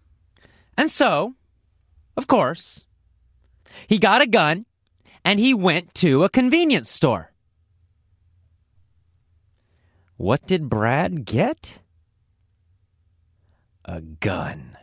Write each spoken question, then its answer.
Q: What did Brad get?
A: A gun.